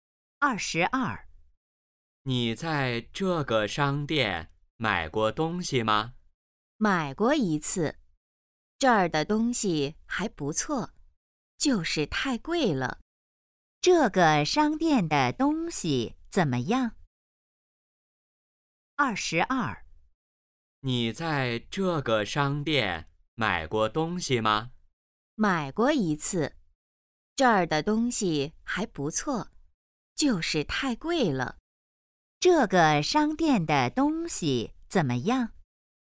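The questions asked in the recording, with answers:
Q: 这个商店的东西怎么样?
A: 不错,就是太贵了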